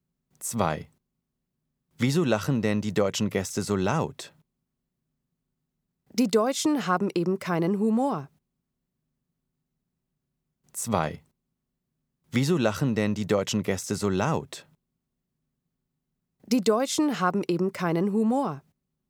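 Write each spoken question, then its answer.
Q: Wieso lachen denn die deutschen Gäste so laut? Die Deutschen haben eben keinen Humor.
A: U: unlogisch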